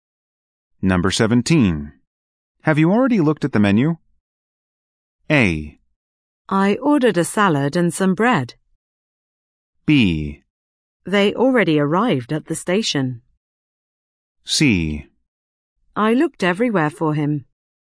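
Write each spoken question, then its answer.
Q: Have you already looked at the menu?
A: A: I ordered a salad and some bread.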